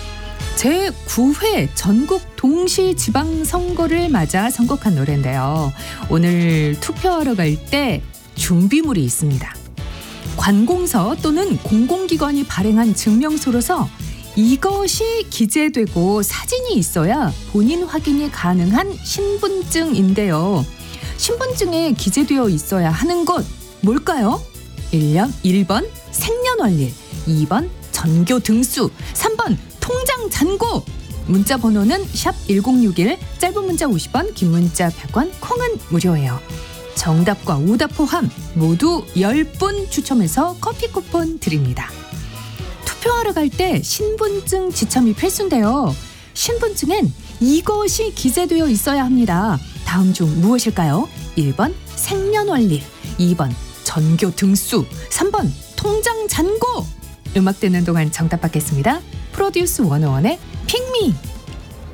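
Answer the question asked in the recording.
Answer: 1: 생년월일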